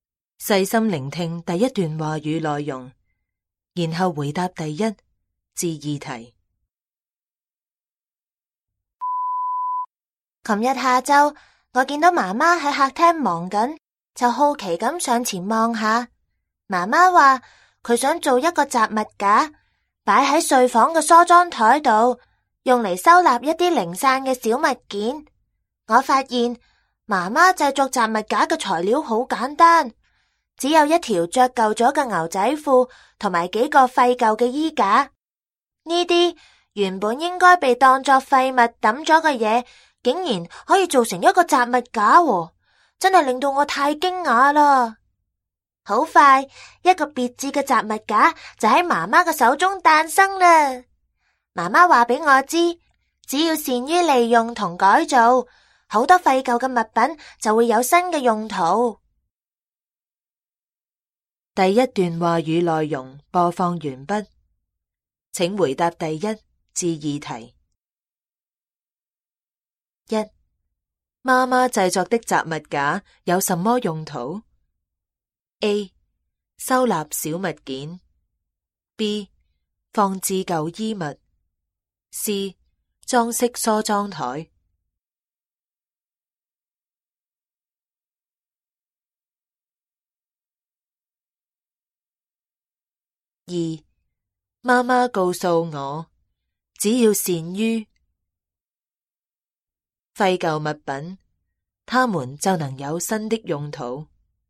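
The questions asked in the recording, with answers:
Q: 妈妈制作的杂物架有什么用途?A. 收纳小物件 B. 放置旧衣物 C. 装饰梳妆台。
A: A: 收纳小物件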